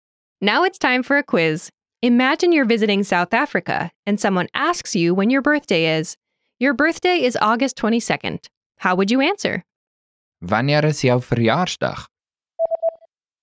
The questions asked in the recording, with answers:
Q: How would you answer? Wanneer is jou verjaarsdag?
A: Dit is Augustus die 22ste.